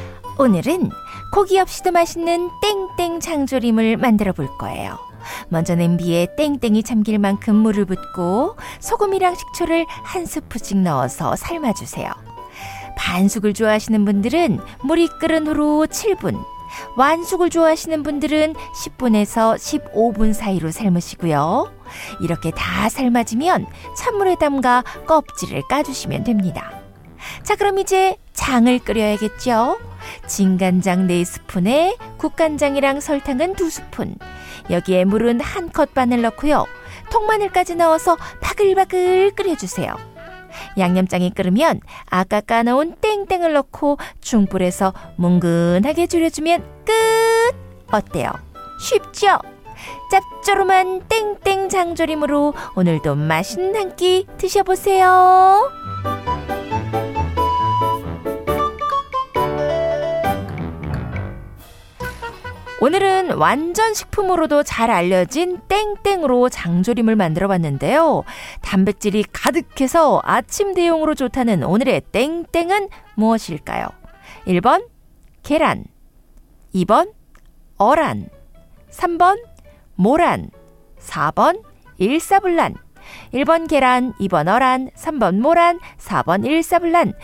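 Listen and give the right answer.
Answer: 1: 계란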